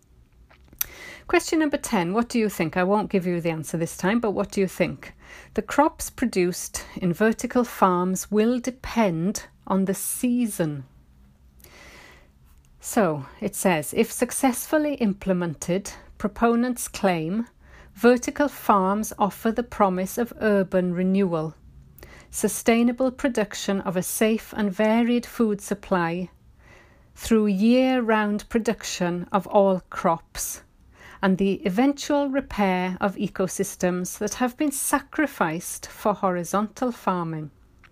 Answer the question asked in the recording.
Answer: so just to be clear, the answer 10 is false.